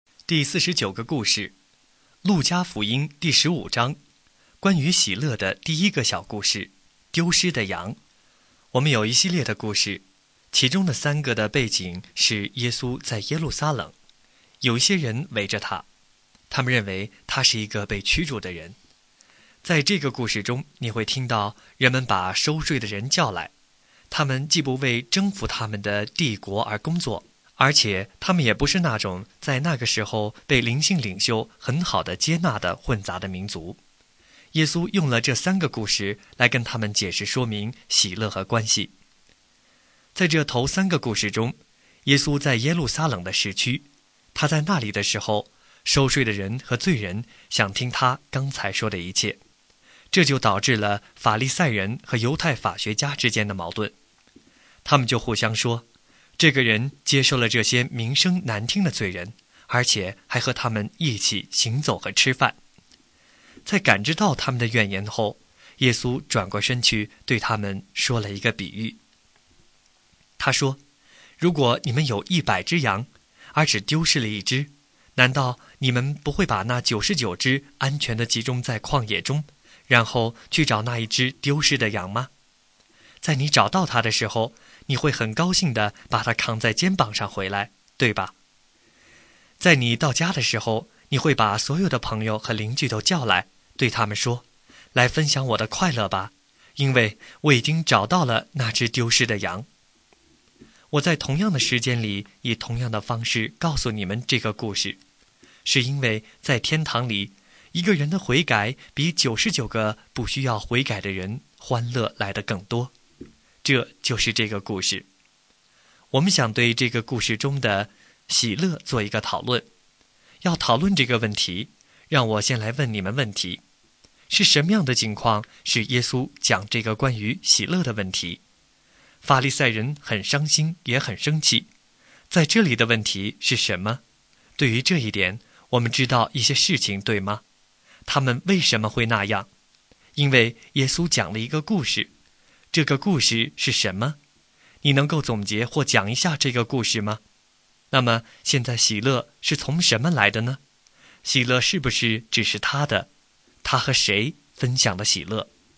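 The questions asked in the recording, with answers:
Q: 他和谁分享了喜乐?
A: 朋友和邻居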